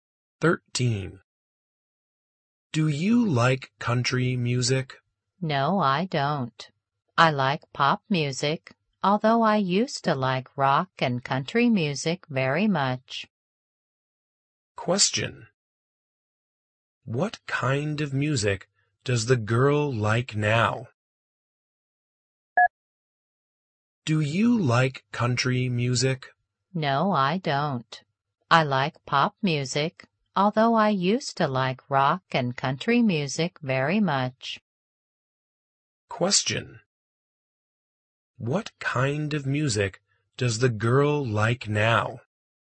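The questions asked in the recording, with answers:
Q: What kind of music does the girl like now?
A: Pop music.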